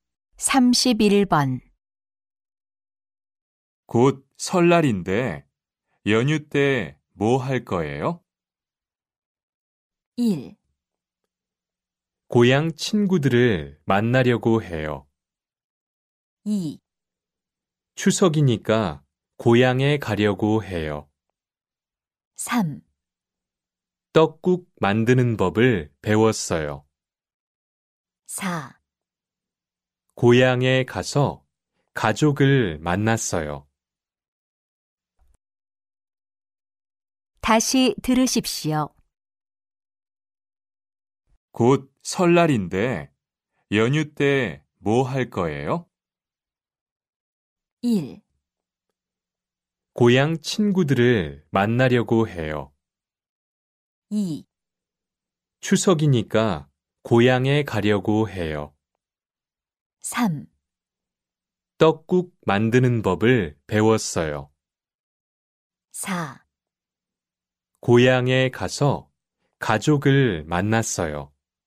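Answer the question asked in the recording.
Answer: 1: 고향 친구들을 만나려고 해요.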